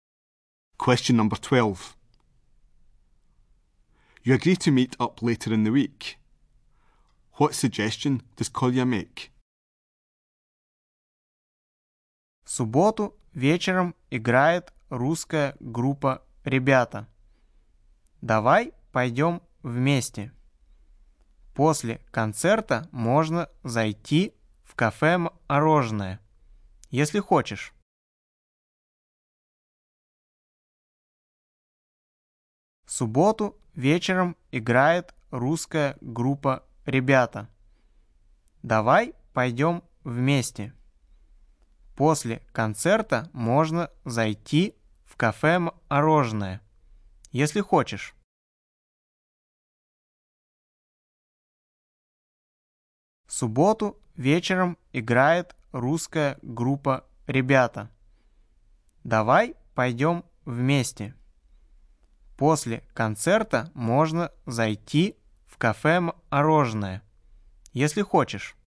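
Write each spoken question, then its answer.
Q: What suggestion does Kolya make?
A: To go together to a concert by the Russian band on Saturday evening, then to the ice-cream café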